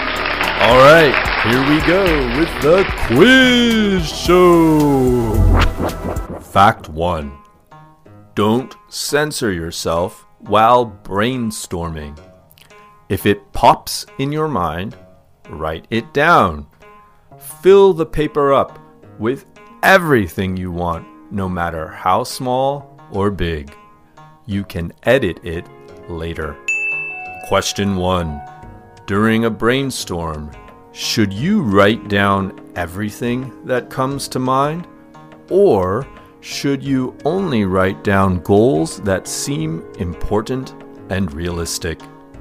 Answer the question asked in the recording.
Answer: Yes, during a brainstorm, you should write down everything that comes to mind.